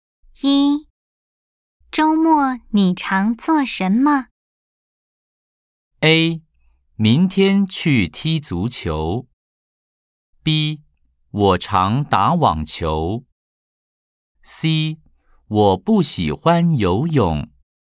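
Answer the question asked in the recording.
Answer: B: 我常打网球。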